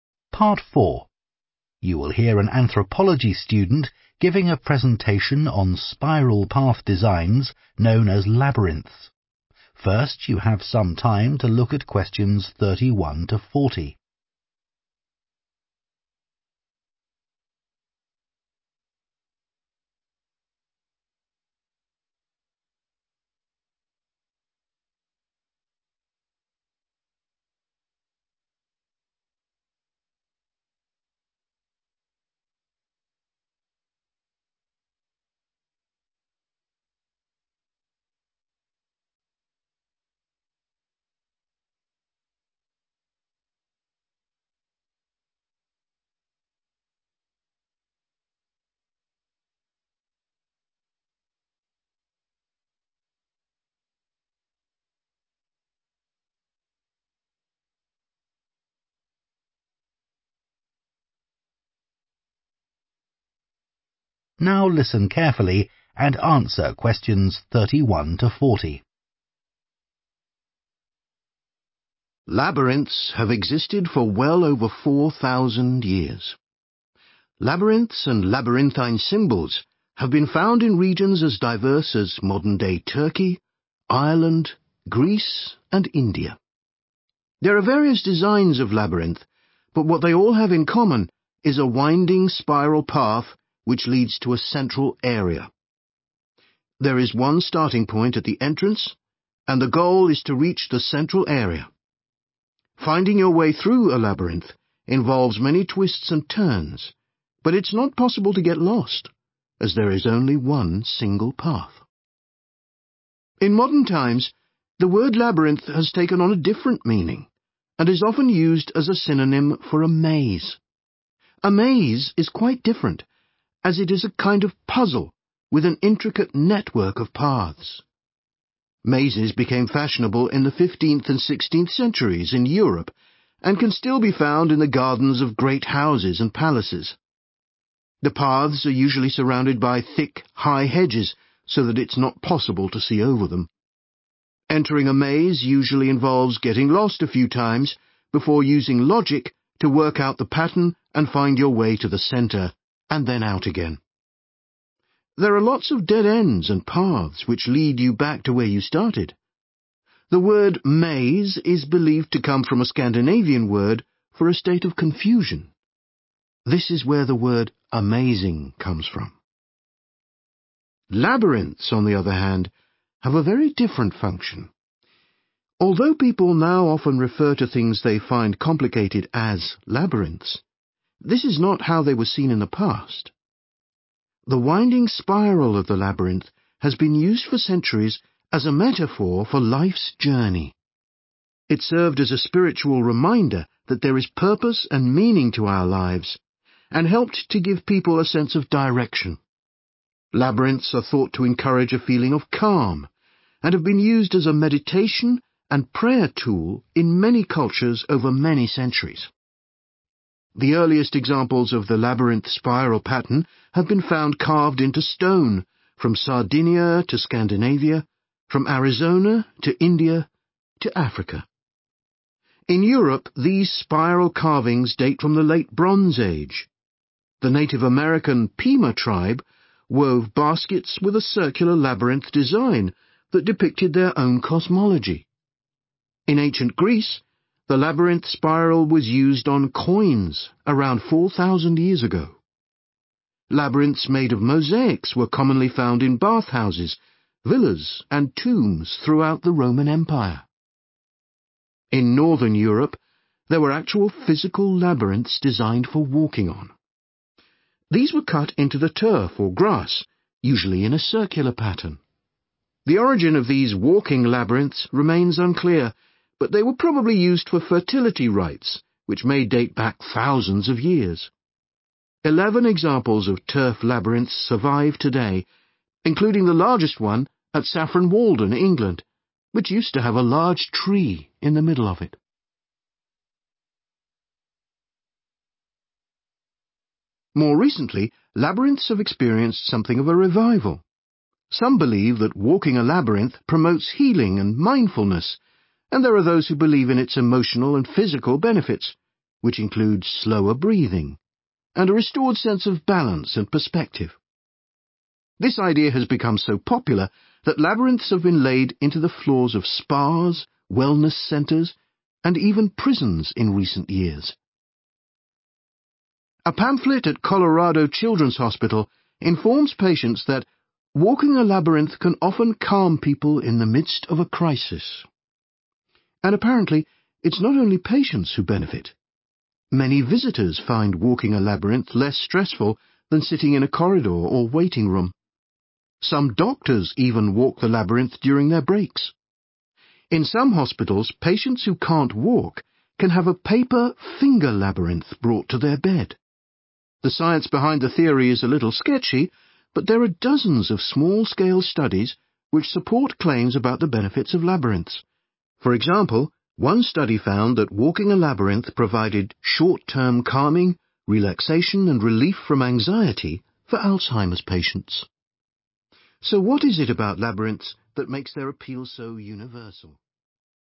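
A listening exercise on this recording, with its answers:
Complete the notes below. Write ONE WORD ONLY for each answer.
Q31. Mazes are a type of 31 ........................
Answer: puzzle

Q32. 32 ........................ is needed to navigate through a maze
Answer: logic

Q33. the word 'maze' is derived from a word meaning a feeling of 33 ........................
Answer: confusion

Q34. they have frequently been used in 34 ........................ and prayer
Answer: meditation

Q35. Ancient carvings on 35 ........................ have been found across many cultures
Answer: stone

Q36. Ancient Greeks used the symbol on 36 ........................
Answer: coins

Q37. The largest surviving example of a turf labyrinth once had a big 37 ........................ at its centre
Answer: tree

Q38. walking a maze can reduce a person's 38 ........................ rate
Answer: breathing

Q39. patients who can't walk can use 'finger labyrinths' made from 39 ........................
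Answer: paper

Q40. research has shown that Alzheimer's sufferers experience less 40 ........................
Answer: anxiety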